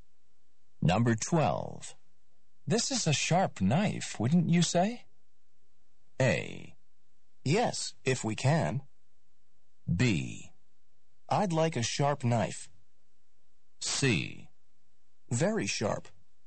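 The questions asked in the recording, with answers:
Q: This is a sharp knife, wouldn't you say?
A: C: Very sharp.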